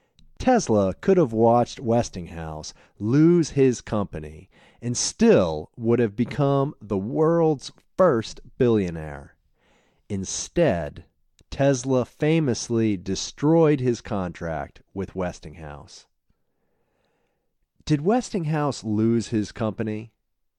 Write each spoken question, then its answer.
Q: Did Westinghouse lose his company?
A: No, Westinghouse didn't lose his company.